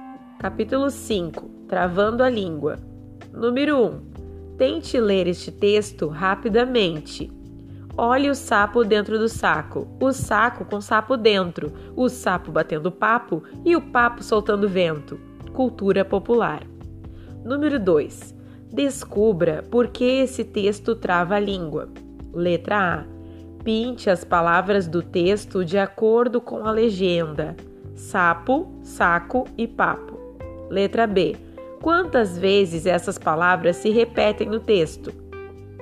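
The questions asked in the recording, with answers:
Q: Quantas vezes essas palavras se repetem no texto?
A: sapo: 3 vezes; saco: 2 vezes; papo: 2 vezes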